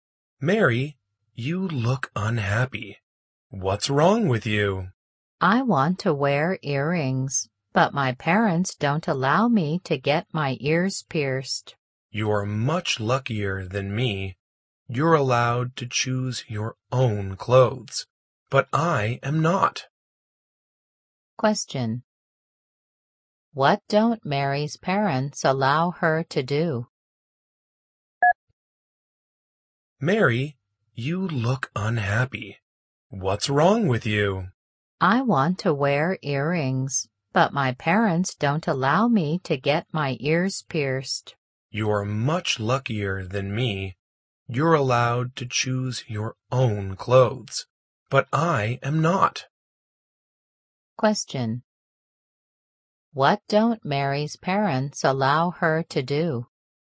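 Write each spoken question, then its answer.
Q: What don't Mary's parents allow her to do?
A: Get her ears pierced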